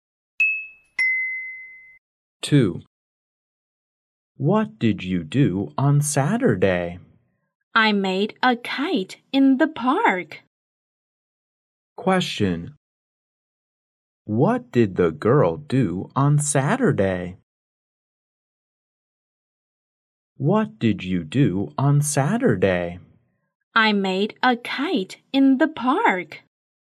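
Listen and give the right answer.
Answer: She made a kite in the park.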